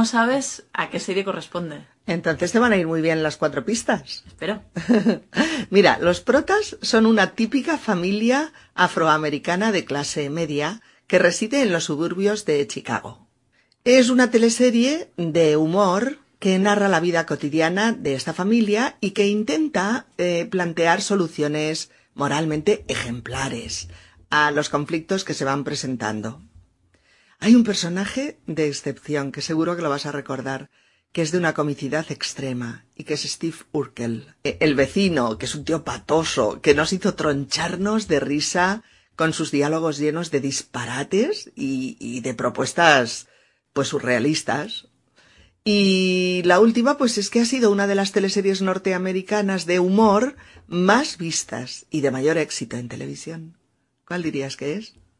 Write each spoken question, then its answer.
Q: ¿Cuál dirías que es?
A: Cosas de casa.